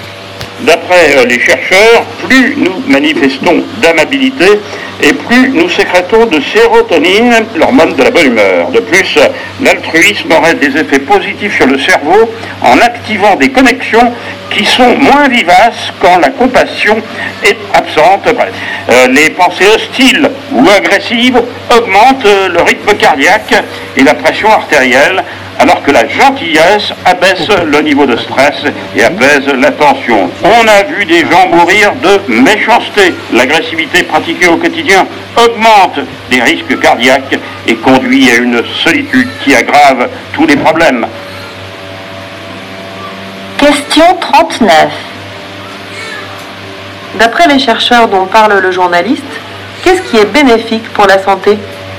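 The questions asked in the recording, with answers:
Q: D'après les chercheurs dont parle le journaliste, qu'est-ce qui est bénéfique pour la santé ?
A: La gentillesse (l'amabilité, l'altruisme)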